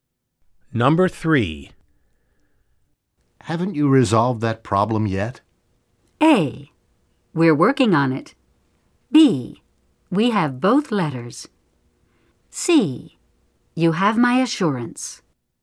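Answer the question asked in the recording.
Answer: A: We're working on it.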